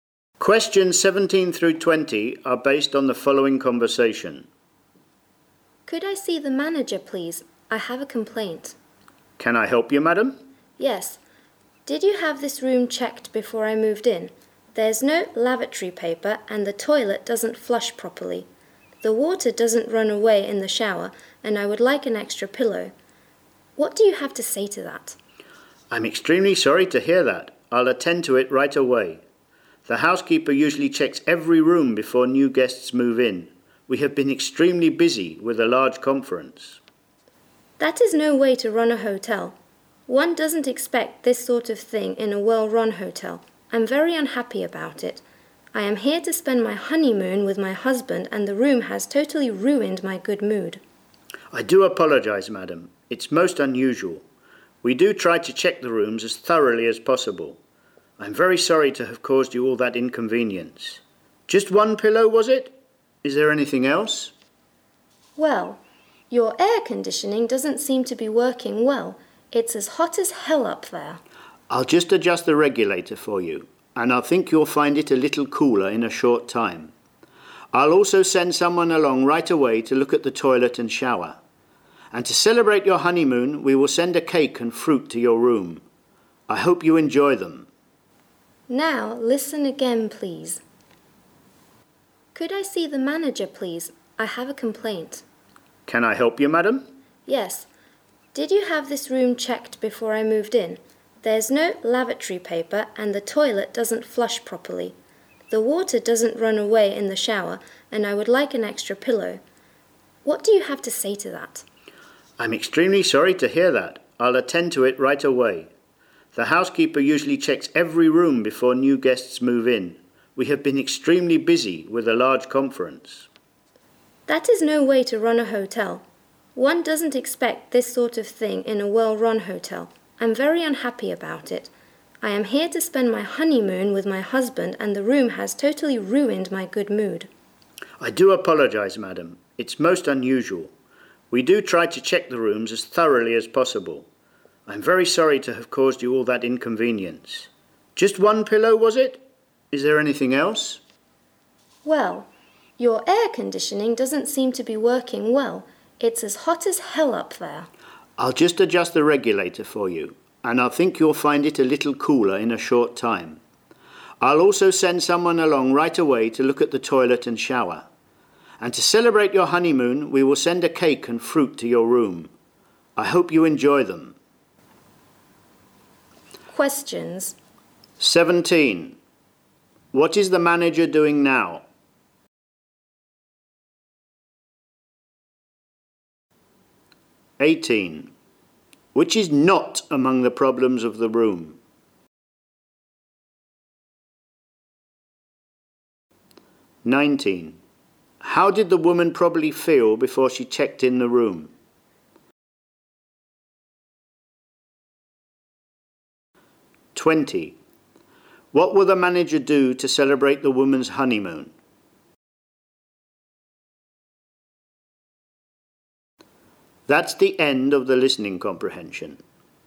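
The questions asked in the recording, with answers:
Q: What will the manager do to celebrate the woman's honeymoon?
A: Send a cake and fruit to her room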